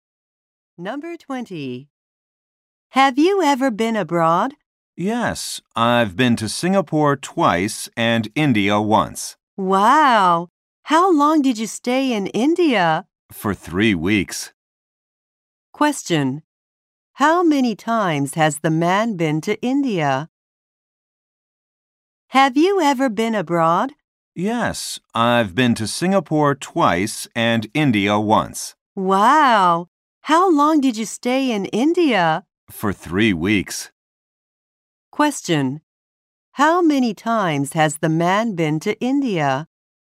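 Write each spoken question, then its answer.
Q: How many times has the man been to India?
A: Once.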